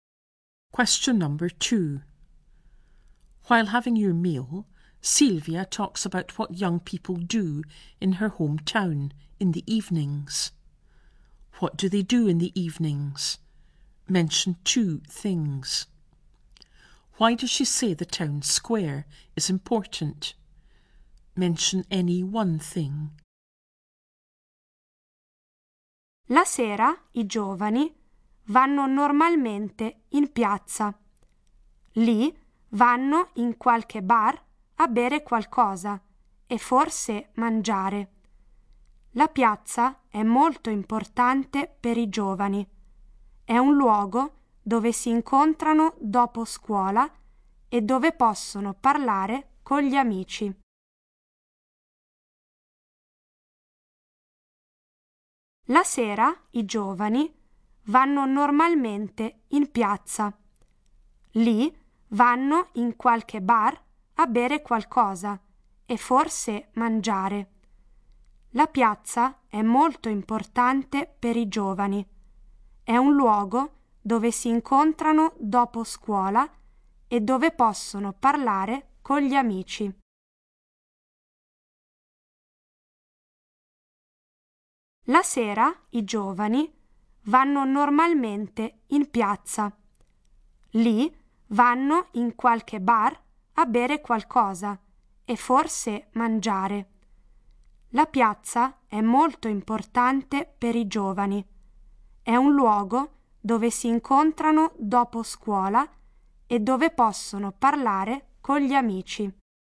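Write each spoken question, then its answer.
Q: What do they do in the evenings?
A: Go to the square; go to a bar to drink and perhaps eat

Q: Why does she say the town square is important?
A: It's where they meet after school and talk with friends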